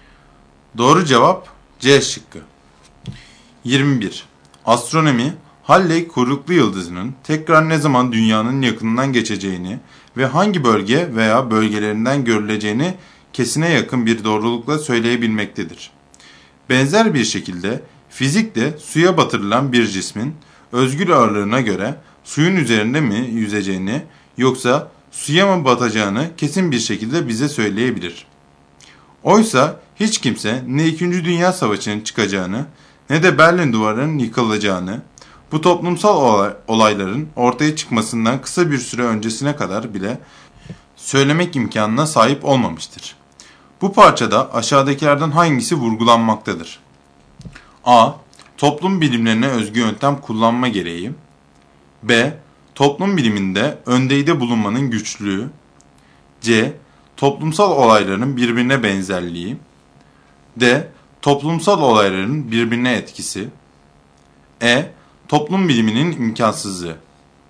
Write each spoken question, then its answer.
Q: Bu parçada aşağıdakilerden hangisi vurgulanmaktadır?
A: Doğru cevap B şıkkı.